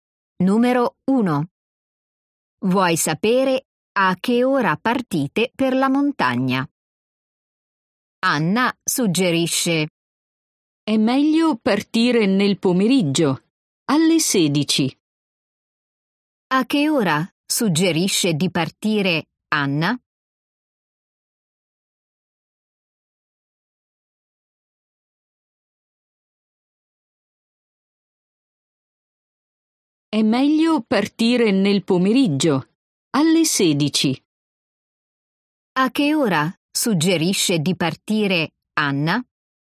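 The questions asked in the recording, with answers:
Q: A che ora suggerisce di partire Anna?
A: Alle 16, nel pomeriggio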